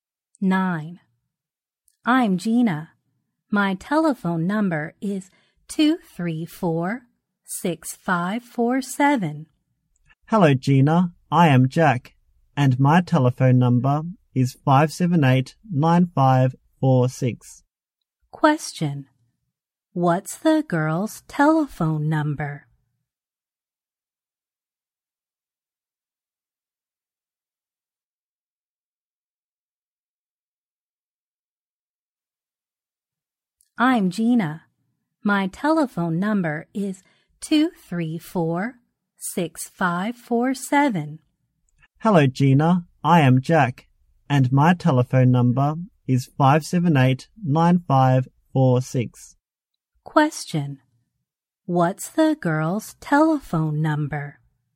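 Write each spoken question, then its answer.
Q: What's the girl's telephone number?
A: 234-6547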